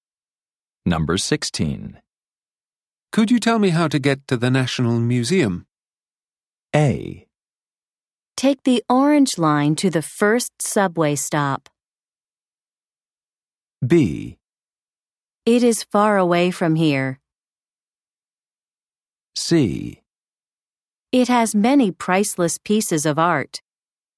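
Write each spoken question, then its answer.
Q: Could you tell me how to get to the National Museum?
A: A: Take the orange line to the first subway stop.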